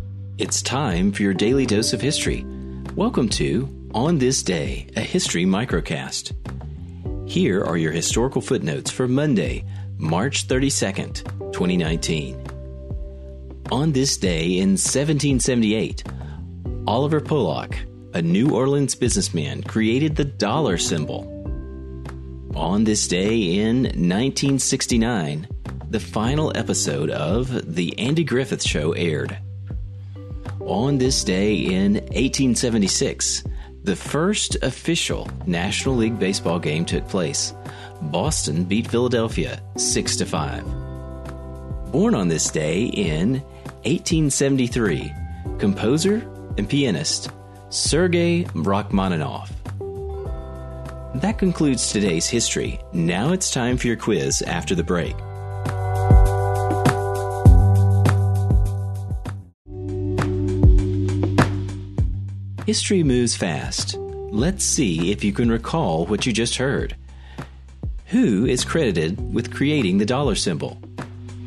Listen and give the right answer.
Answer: The answer? Oliver Pollock.